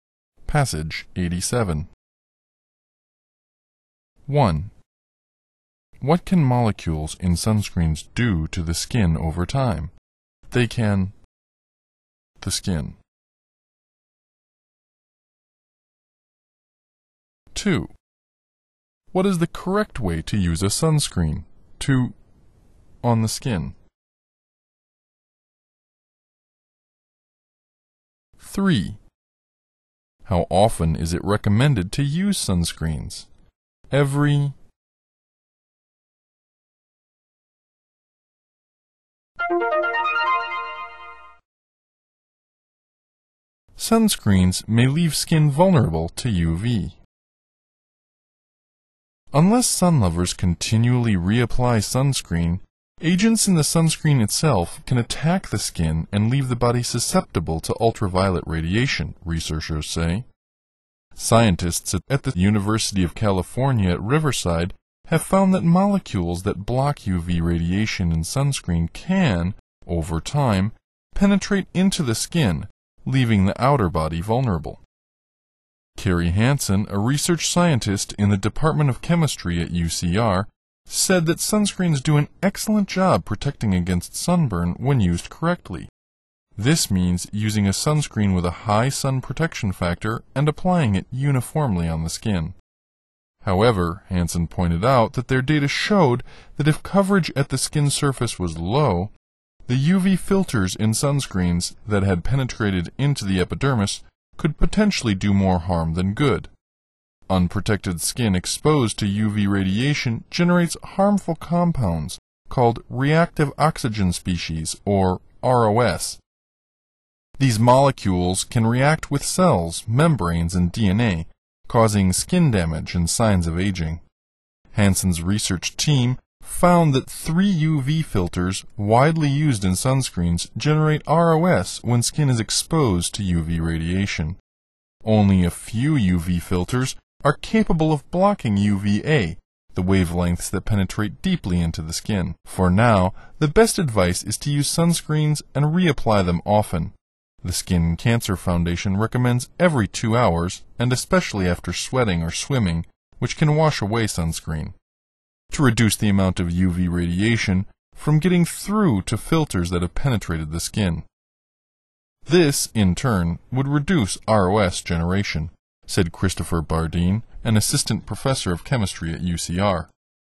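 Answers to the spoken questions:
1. penetrate into the skin
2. use a high SPF sunscreen and apply it uniformly on the skin
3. every 2 hours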